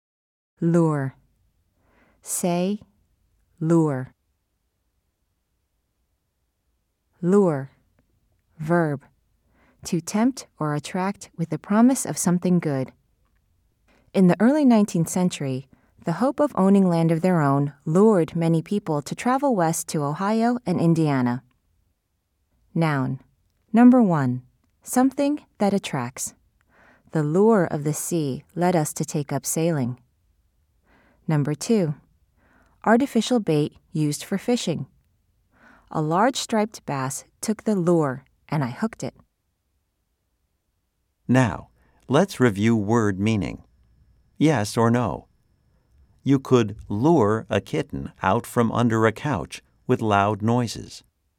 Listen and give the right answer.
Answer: If you said no, you are right.